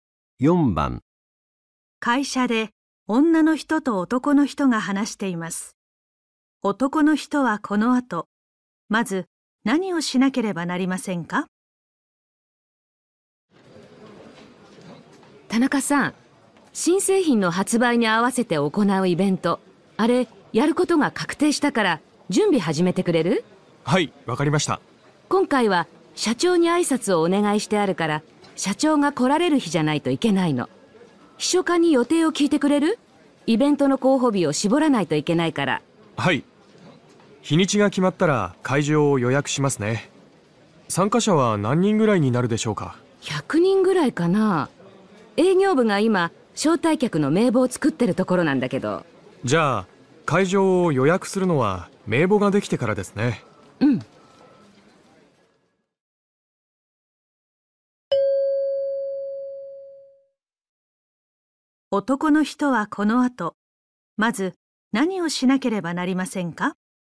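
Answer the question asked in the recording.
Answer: 秘書課に社長の予定を聞く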